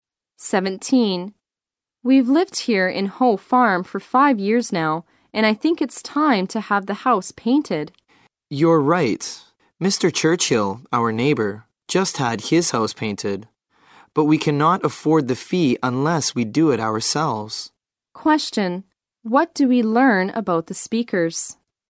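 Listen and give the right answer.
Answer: They can't afford to pay someone to paint the house, so they'll have to paint it themselves.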